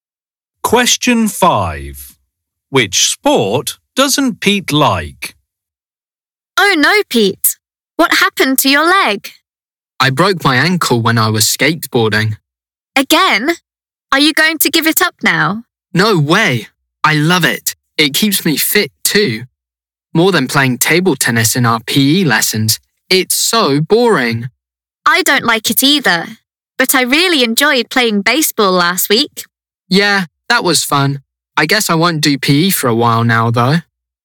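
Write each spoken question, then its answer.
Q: Which sport doesn't Pete like?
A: table tennis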